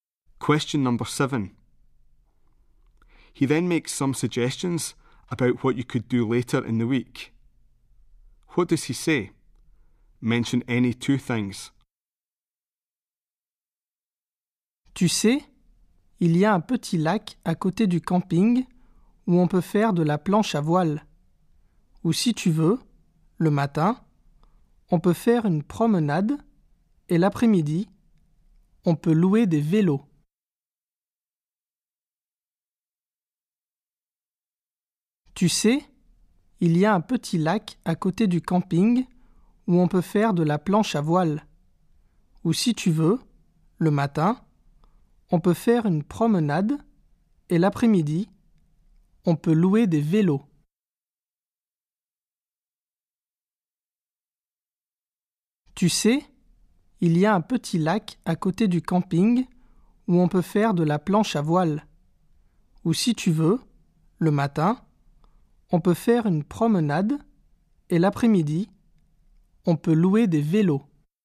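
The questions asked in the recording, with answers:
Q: What does he say? Mention any two things.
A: Windsurfing on a small lake next to the campsite; a walk in the morning; hiring bikes in the afternoon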